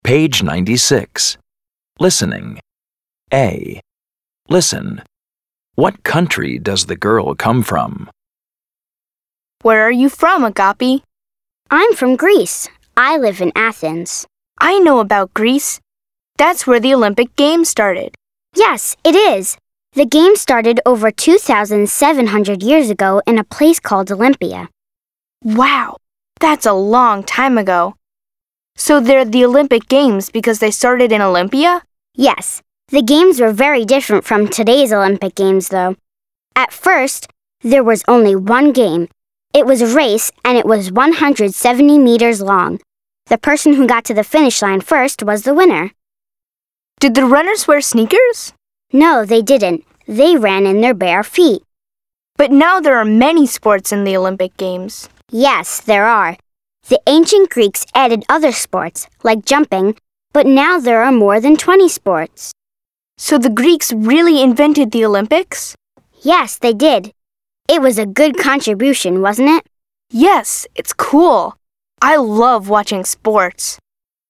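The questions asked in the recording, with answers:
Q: What country does the girl come from?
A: Greece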